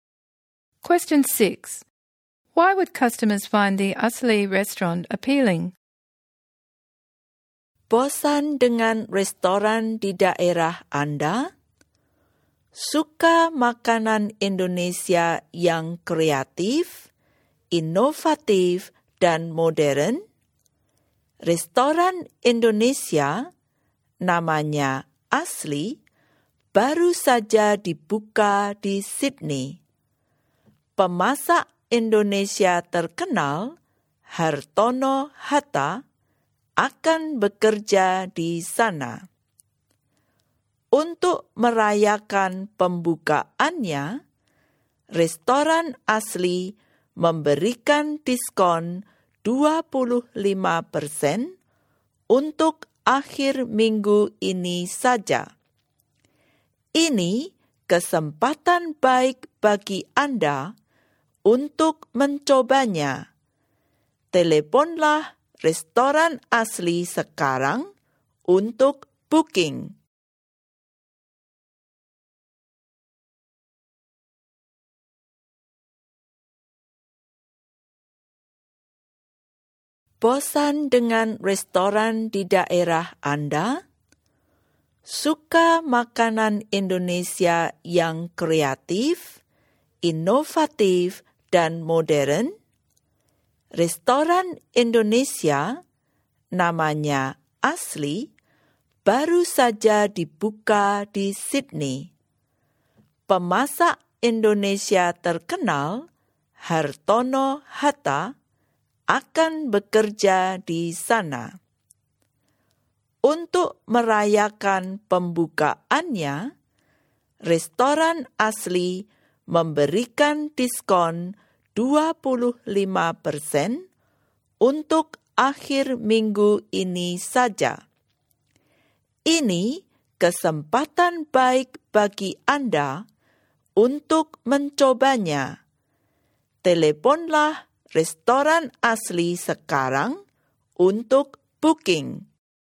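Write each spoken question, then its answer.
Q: Why would customers find the Asli restaurant appealing?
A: It is new and serves creative, modern Indonesian food, a famous chef works there, and there is a 25% opening discount this weekend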